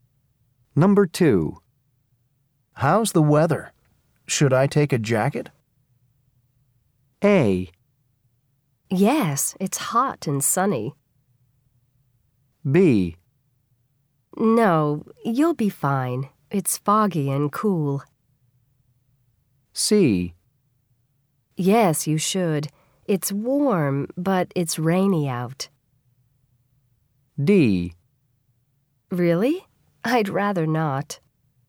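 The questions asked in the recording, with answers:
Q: How's the weather? Should I take a jacket?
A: C: Yes, you should. It's warm, but it's rainy out.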